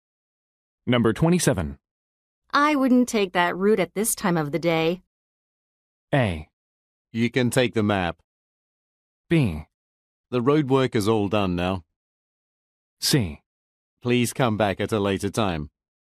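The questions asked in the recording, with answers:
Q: I wouldn't take that route at this time of the day.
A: B: The road work is all done now.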